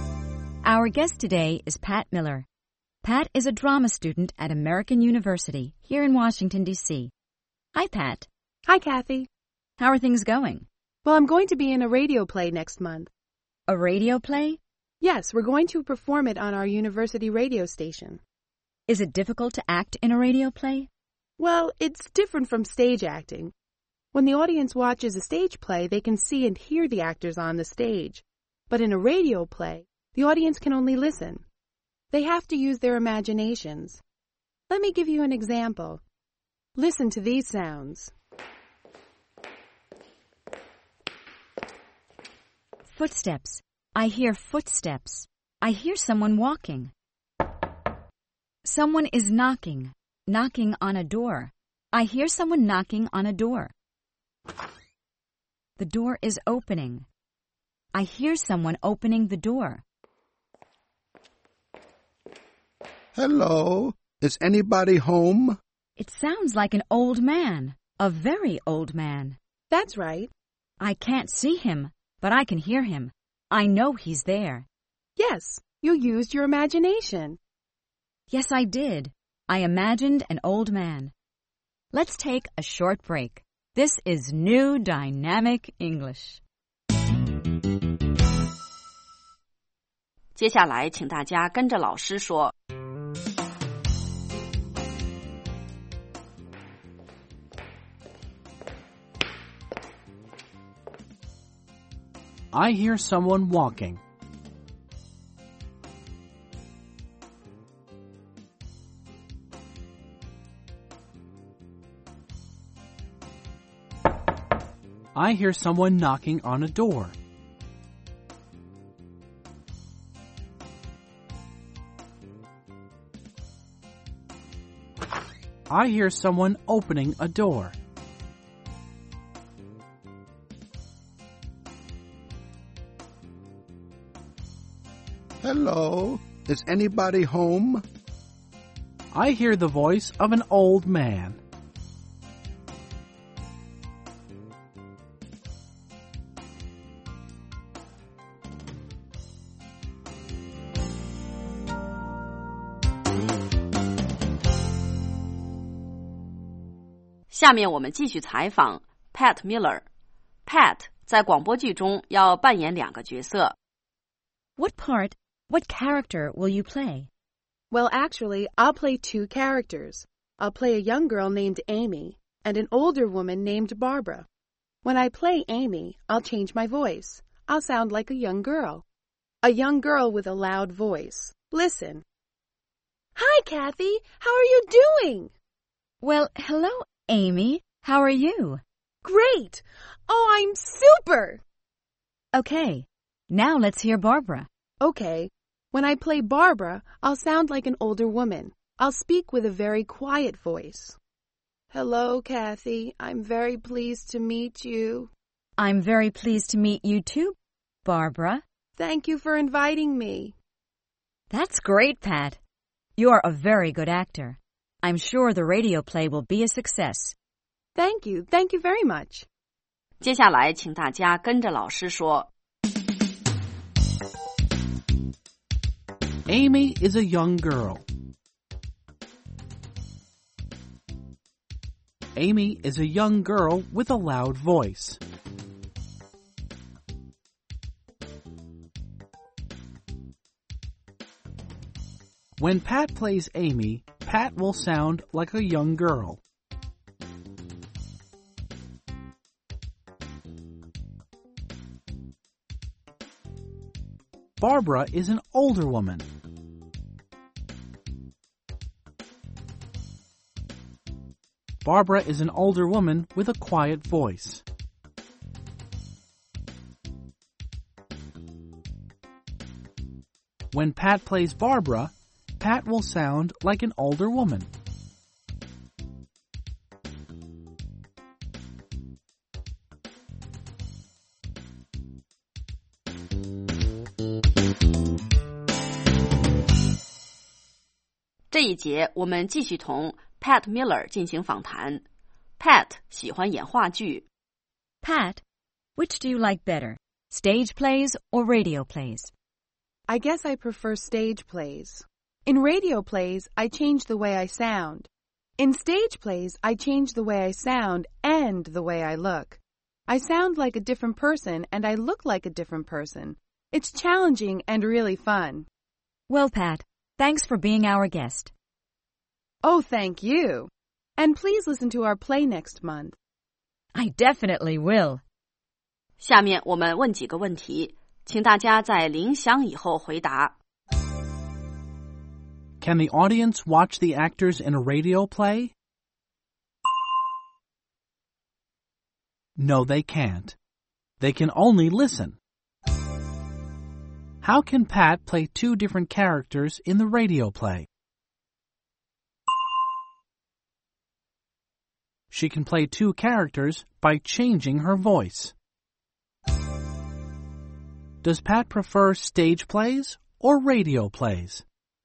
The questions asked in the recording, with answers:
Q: Can the audience watch the actors in a radio play?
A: No, they can't. They can only listen.

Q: Does Pat prefer stage plays or radio plays?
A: She prefers stage plays.